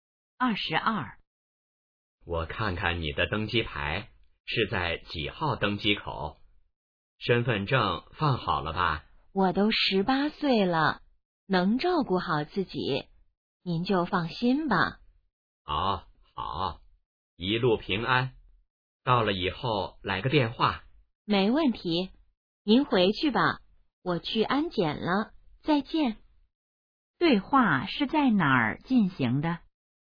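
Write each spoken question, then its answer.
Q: 对话是在哪儿进行的?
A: 机场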